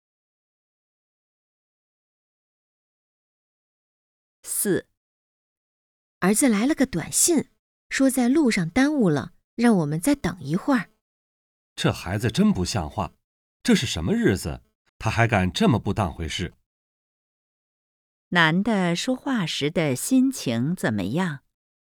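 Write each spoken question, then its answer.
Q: 男的说话时的心情怎么样?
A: 生气,不满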